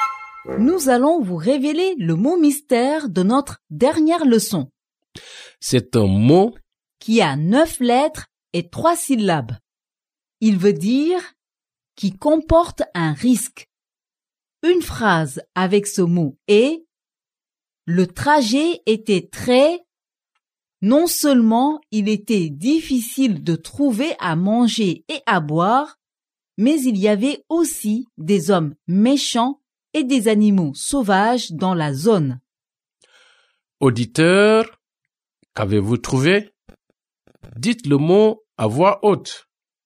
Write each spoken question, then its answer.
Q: Auditeur, qu'avez-vous trouvé?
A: Le mot mystère d'aujourd'hui est dangereux.